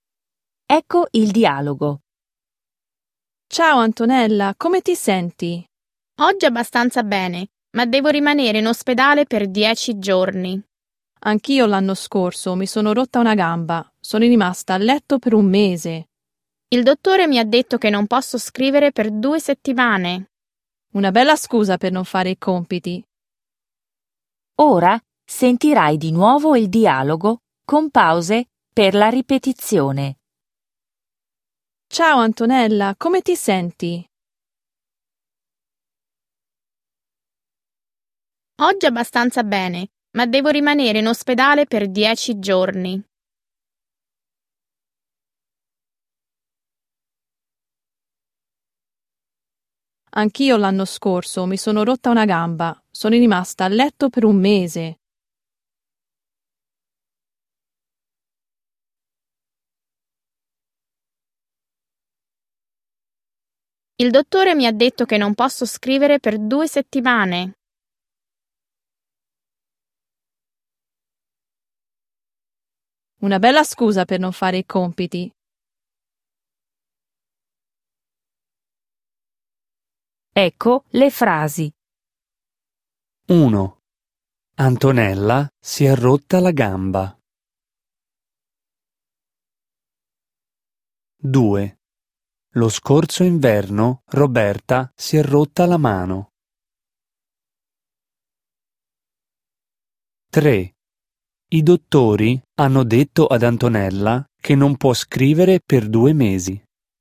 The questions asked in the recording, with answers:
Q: Lo scorso inverno Roberta si è rotta la mano.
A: Falso.

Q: I dottori hanno detto ad Antonella che non può scrivere per 2 mesi.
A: Falso.